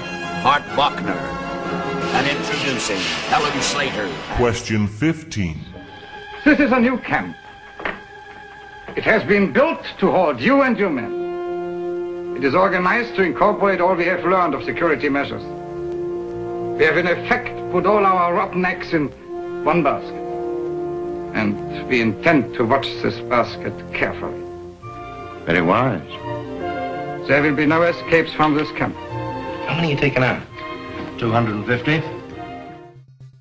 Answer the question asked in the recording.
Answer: And number 15, The Great Escape.